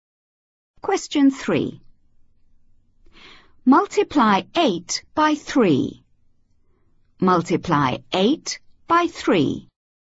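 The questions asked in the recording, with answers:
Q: Multiply 8 by 3.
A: 24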